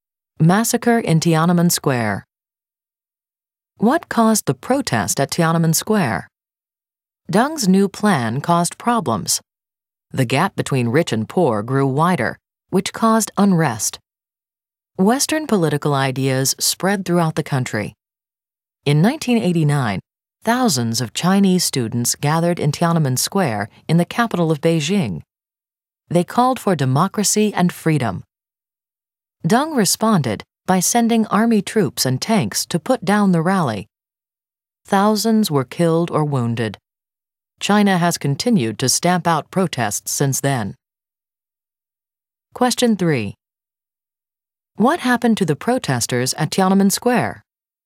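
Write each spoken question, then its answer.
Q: What happened to the protesters at Tiananmen Square?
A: Army troops and tanks put down the rally; thousands were killed or wounded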